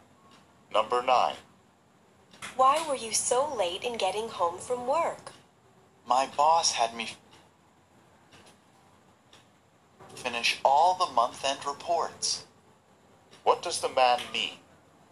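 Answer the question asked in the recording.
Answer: He had to stay late to finish the month-end reports.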